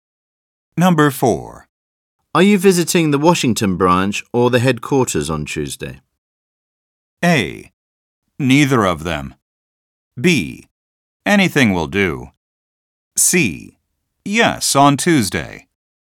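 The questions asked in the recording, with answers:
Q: Are you visiting the Washington branch or the headquarters on Tuesday?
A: A: Neither of them.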